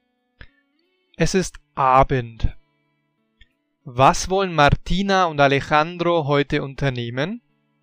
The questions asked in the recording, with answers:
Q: Was wollen Martina und Alejandro heute unternehmen?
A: Sie wissen es nicht. Sie haben keine Ahnung.